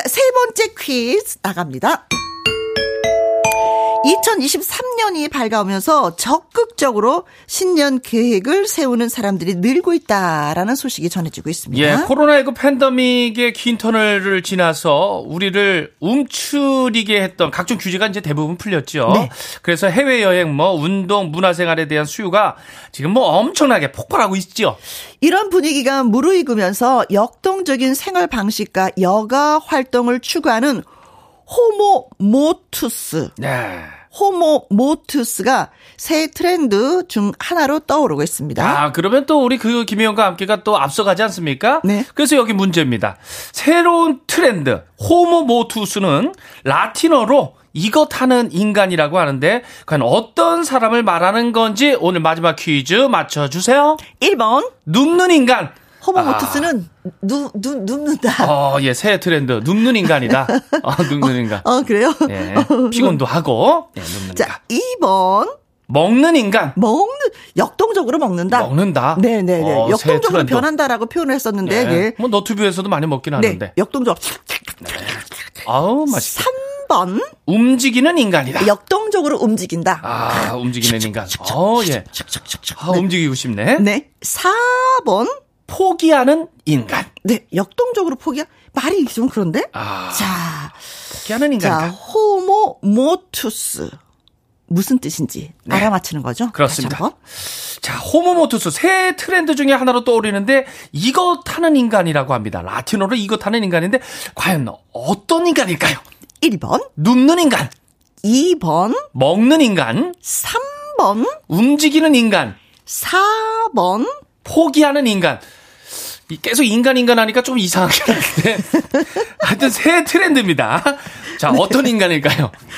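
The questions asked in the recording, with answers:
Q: 새로운 트렌드, 호모 모투스는 라틴어로 이것 하는 인간이라고 하는데, 과연 어떤 사람을 말하는 건지 오늘 마지막 퀴즈 맞춰주세요.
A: 3: 움직이는 인간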